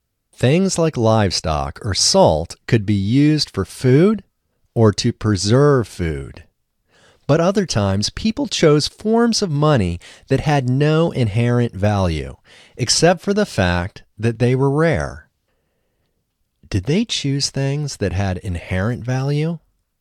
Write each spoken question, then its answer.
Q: Did they choose things that had inherent value?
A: No, they didn't choose things that had inherent value.